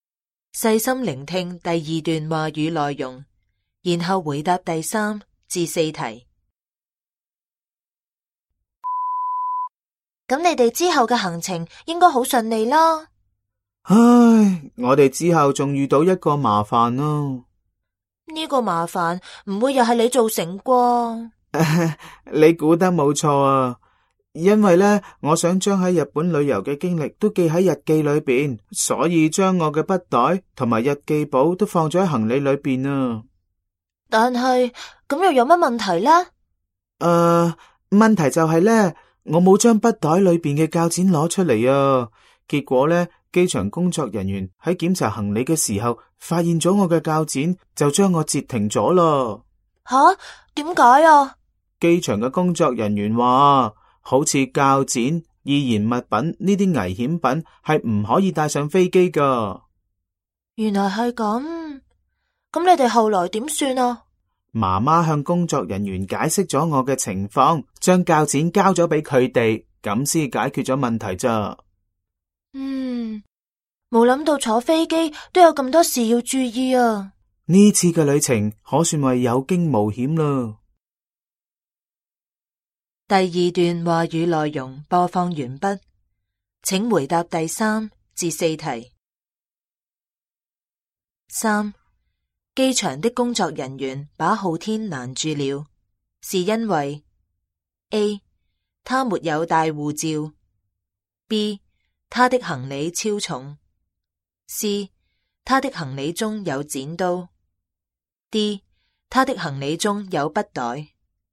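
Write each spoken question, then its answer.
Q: 机场的工作人员把浩天拦住了,是因为 A, 他没有带护照 ;B, 他的行李超重 ;C, 他的行李中有剪刀 ;D, 他的行李中有笔袋。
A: C: 他的行李中有剪刀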